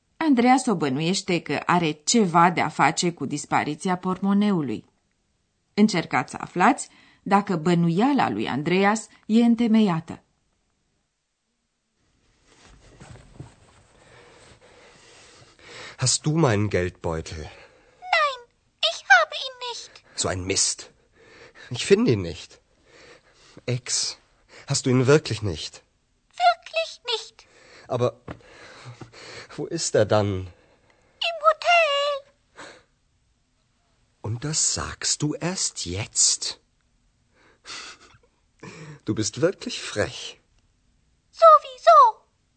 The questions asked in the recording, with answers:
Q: Încercați să aflați dacă bănuiala lui Andreas e întemeiată.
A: E adevărat că ex n-a luat portmoneul lui Andreas, dar ea a observat că l-a uitat la hotel și, cu toate acestea, nu i-a spus.